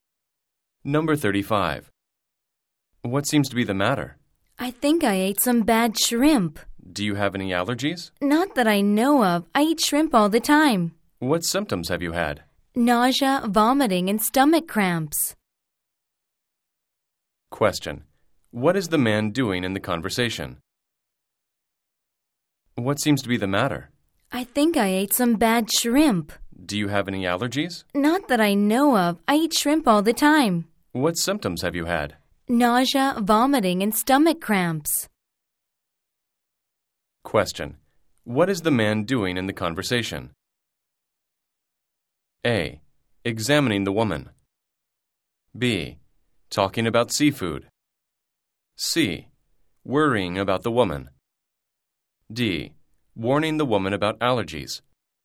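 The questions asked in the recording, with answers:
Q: What is the man doing in the conversation?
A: A: Examining the woman.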